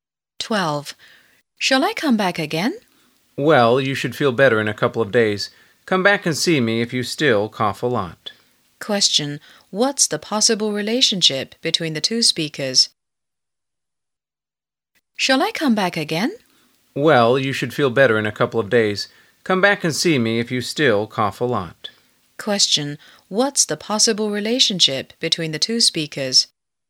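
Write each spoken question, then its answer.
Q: What's the possible relationship between the two speakers?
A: Doctor and patient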